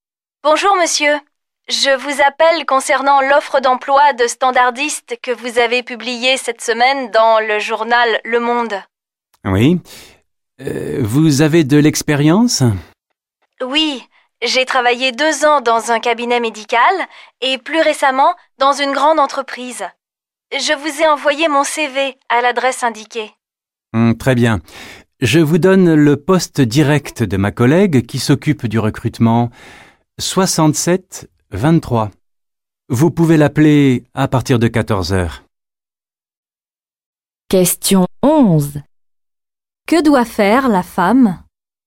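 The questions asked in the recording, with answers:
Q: Que doit faire la femme?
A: Appeler la collègue au poste 67 23 à partir de 14h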